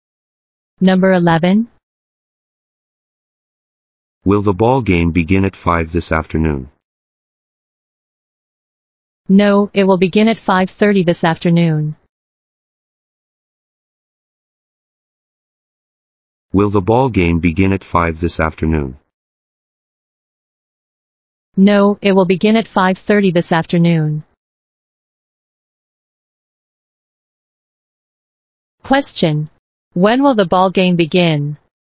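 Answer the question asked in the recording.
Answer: At 5:30 this afternoon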